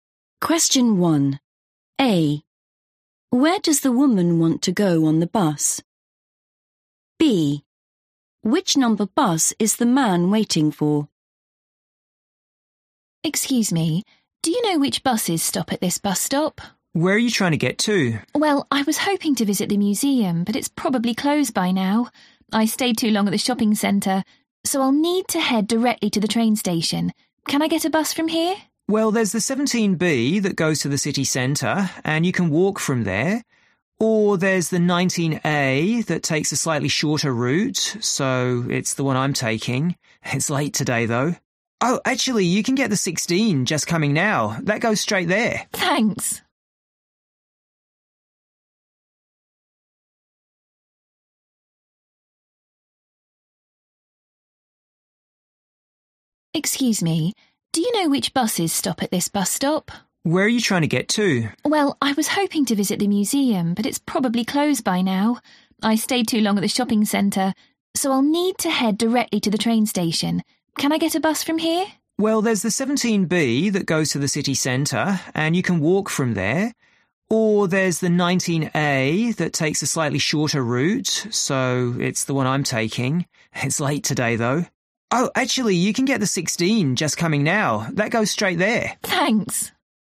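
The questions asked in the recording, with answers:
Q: Where does the woman want to go on the bus?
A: the train station

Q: Which number bus is the man waiting for?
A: 19A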